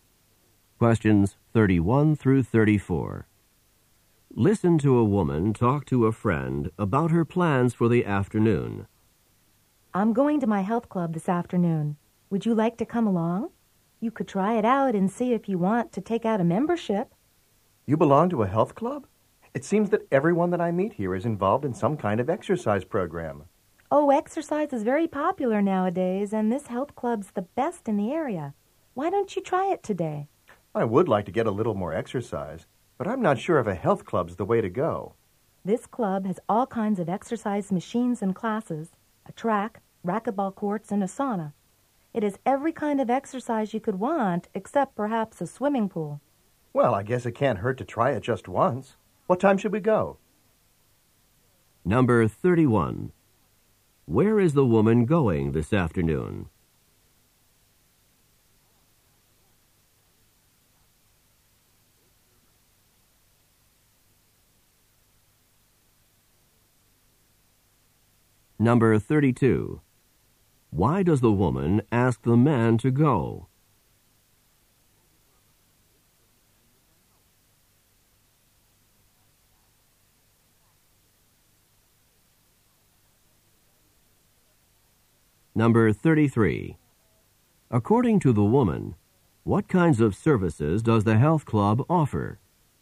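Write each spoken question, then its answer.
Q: Where is the woman going this afternoon?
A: To her health club

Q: Why does the woman ask the man to go?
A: So he can try it out and see if he wants to join

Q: According to the woman, what kinds of services does the health club offer?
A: Exercise machines, classes, a track, racquetball courts and a sauna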